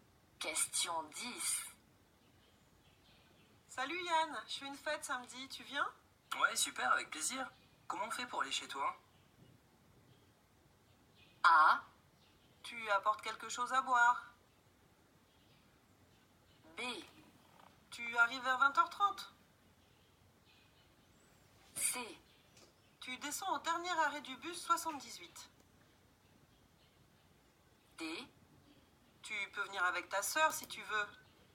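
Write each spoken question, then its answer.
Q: Comment on fait pour aller chez toi?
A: C: Tu descends au dernier arrêt du bus 78.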